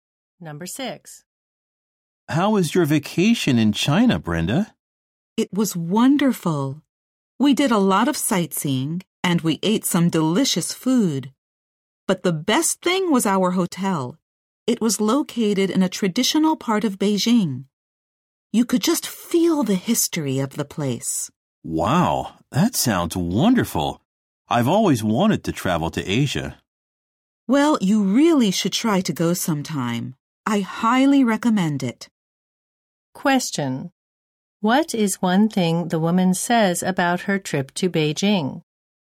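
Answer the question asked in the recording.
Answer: Her hotel was the best thing; it was in a traditional part of Beijing.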